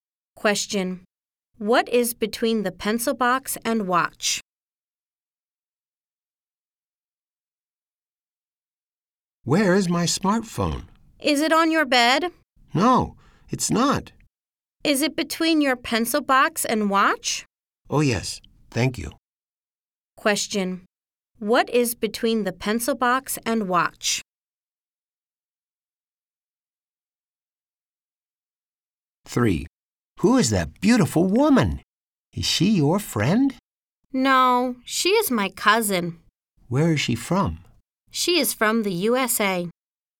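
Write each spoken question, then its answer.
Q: What is between the pencil box and watch?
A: The smartphone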